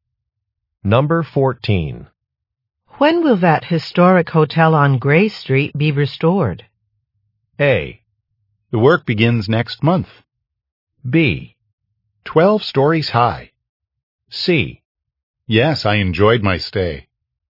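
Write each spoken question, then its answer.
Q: When will that historic hotel on Gray Street be restored?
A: A: The work begins next month.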